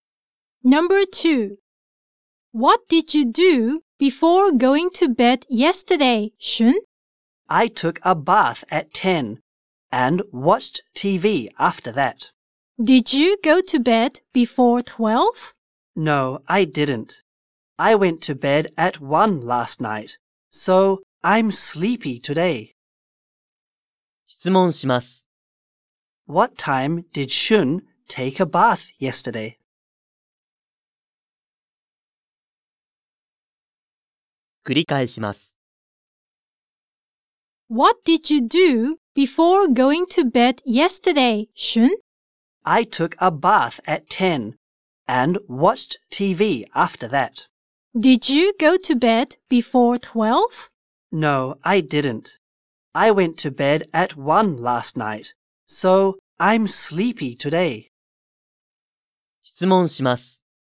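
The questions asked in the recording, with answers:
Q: What time did Shun take a bath yesterday?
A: At 10.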